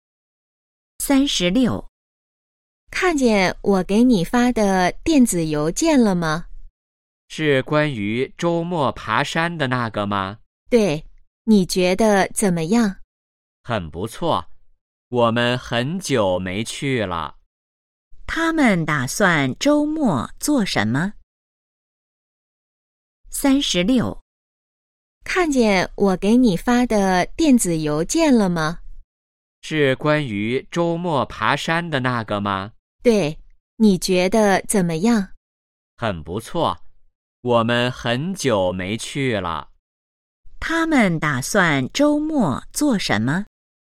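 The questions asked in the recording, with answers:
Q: 他们打算周末做什么?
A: 爬山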